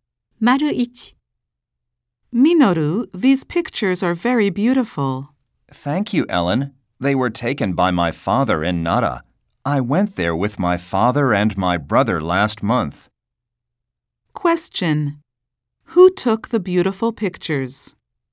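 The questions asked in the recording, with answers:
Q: Who took the beautiful pictures?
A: Minoru's father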